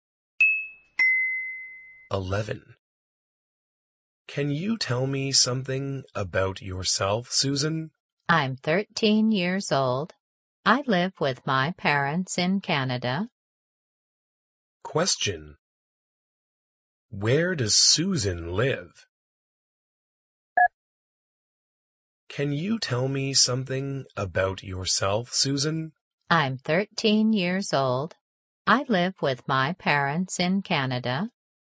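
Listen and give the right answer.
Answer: In Canada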